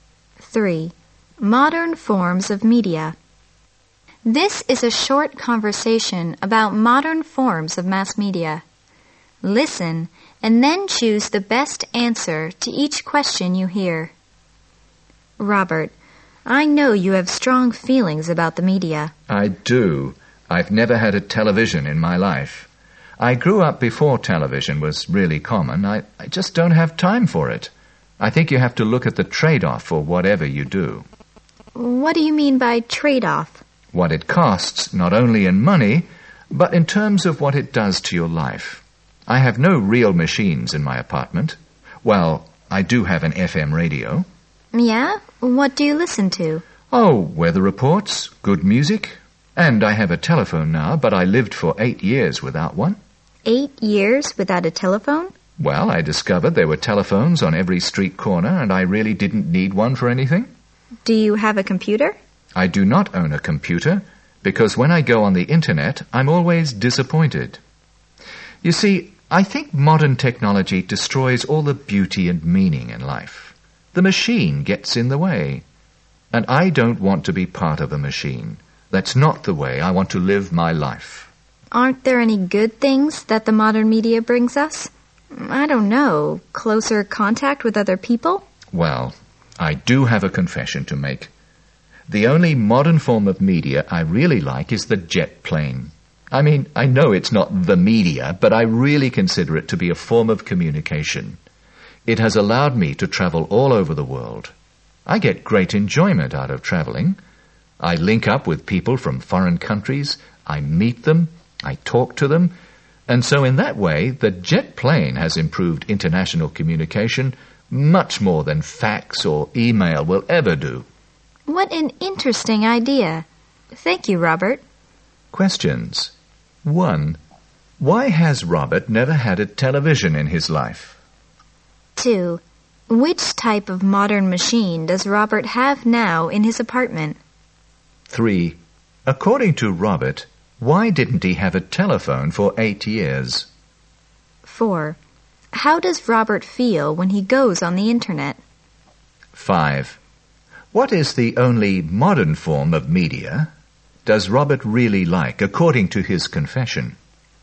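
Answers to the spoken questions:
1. He doesn't have time for it
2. An FM radio (and a telephone)
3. There were telephones on every street corner, so he didn't need one
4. Disappointed
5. The jet plane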